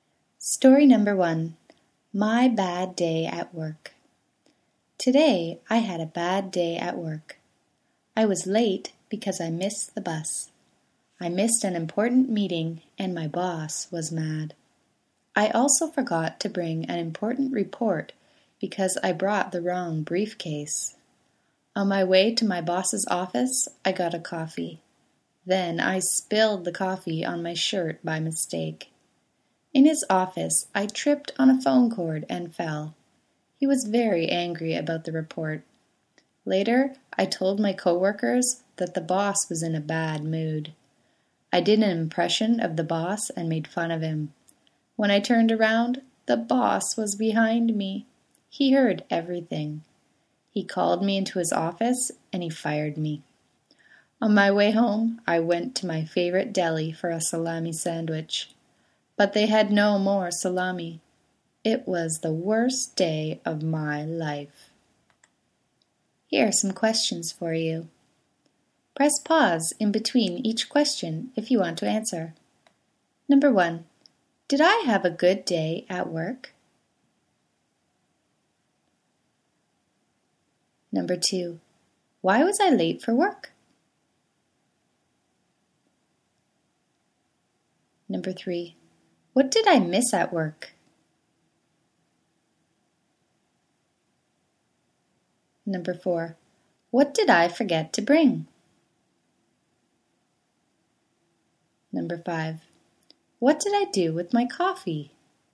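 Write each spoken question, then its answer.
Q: Did I have a good day at work?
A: No

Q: why was I late for work?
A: Because I missed the bus

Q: what did I miss at work?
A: An important meeting

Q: what did I forget to bring?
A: An important report

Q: what did I do with my coffee?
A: Spilled it on my shirt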